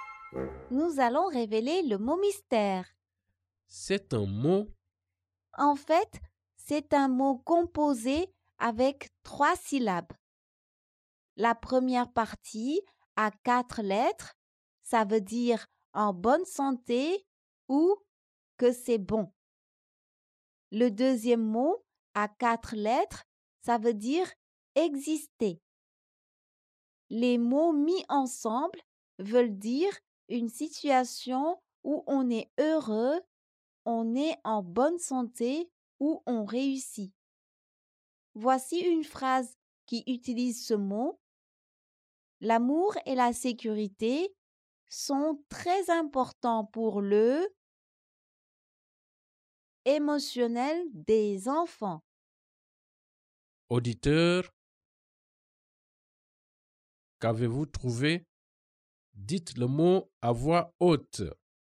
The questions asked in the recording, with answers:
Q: Auditeur, qu'avez-vous trouvé?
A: Le mot mystère est bien-être.